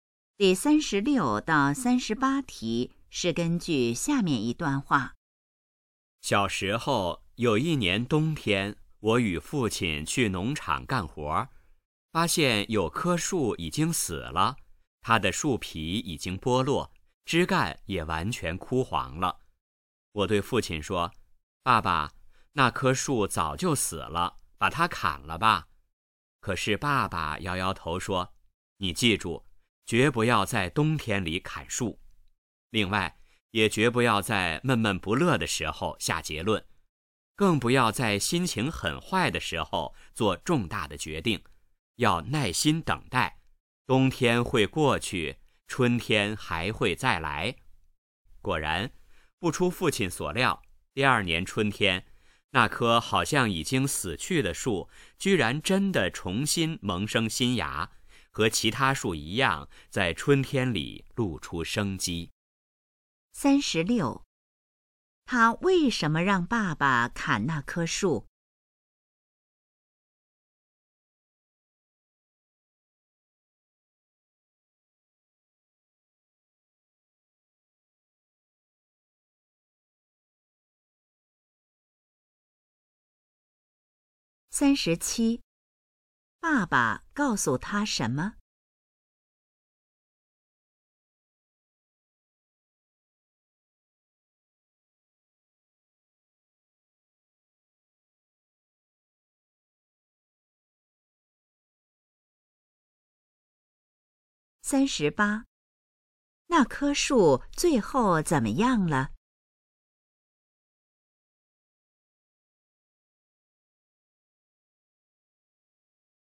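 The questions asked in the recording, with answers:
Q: 他为什么让爸爸砍那棵树?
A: 他以为那棵树已经死了

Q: 那棵树最后怎么样了?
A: 第二年春天重新萌生新芽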